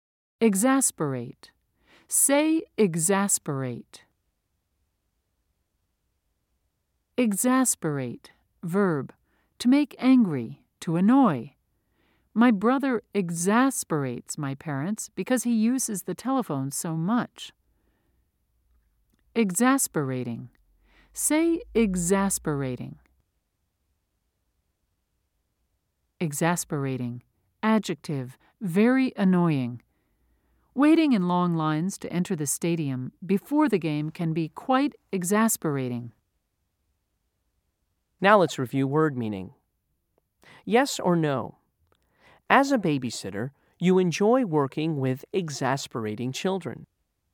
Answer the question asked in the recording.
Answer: If you said no, you're right.